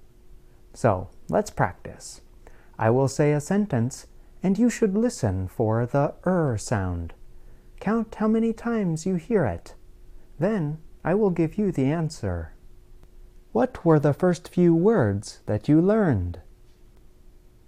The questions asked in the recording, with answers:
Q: Count how many times you hear it.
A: In the sentence, I said the er sound four times.